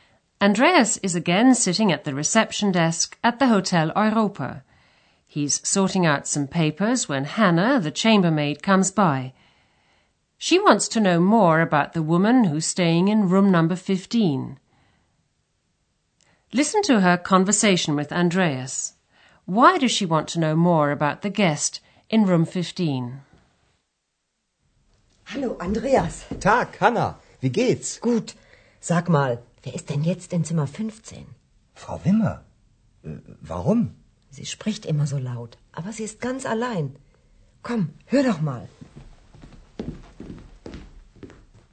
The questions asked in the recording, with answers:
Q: Why does she want to know more about the guest in room 15?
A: Hannah wants to know who's in room 15, because she's noticed that the woman always speaks in such a loud voice.